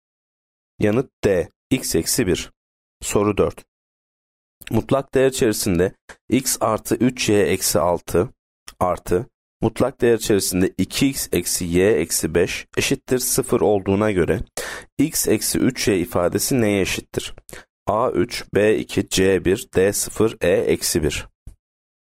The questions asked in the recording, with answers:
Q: Mutlak değer içerisinde x artı 3 y eksi 6 artı, mutlak değer içerisinde 2x eksi y eksi 5 eşittir 0 olduğuna göre x eksi 3y ifadesi neye eşittir?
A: Yanıt D 0.